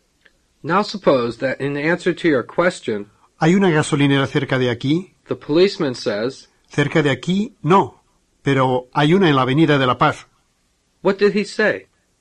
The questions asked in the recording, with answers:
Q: What did he say?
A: He said, near here, no, but there is one on La Paz Avenue.